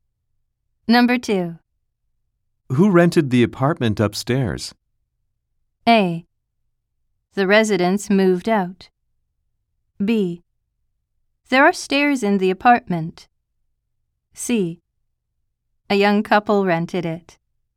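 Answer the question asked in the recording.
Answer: C: A young couple rented it.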